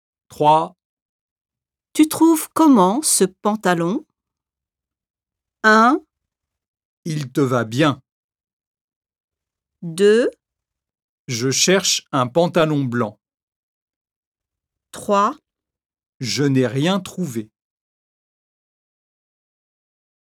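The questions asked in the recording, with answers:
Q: Tu trouves comment ce pantalon?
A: 1: Il te va bien.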